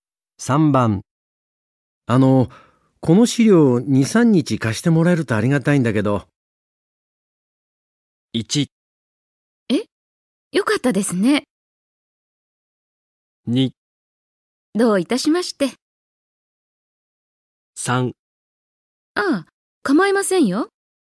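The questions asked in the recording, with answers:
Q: この資料を2、3日貸してもらえるとありがたいんだけど。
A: 3: ああ、構いませんよ。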